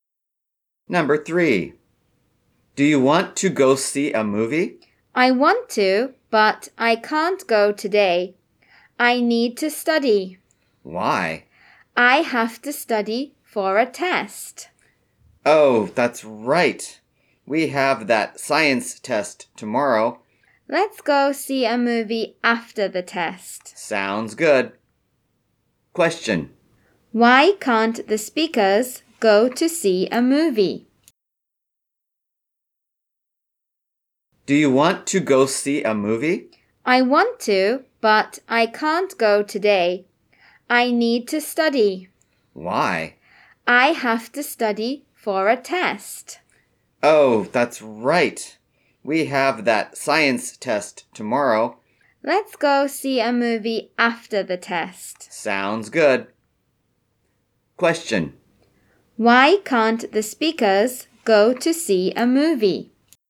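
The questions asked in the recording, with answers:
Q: Why can't the speakers go to see a movie?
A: They have to study for a science test tomorrow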